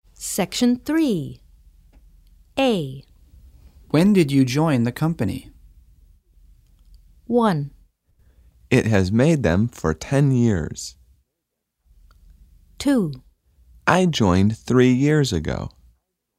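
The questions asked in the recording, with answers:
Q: When did you join the company?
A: 2: I joined 3 years ago.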